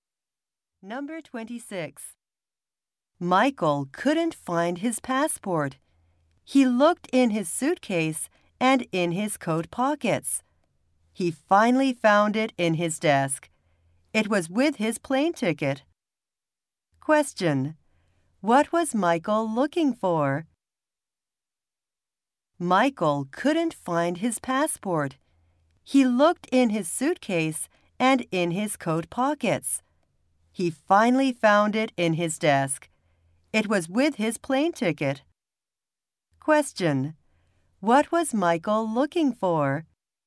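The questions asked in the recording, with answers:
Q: What was Michael looking for?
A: His passport.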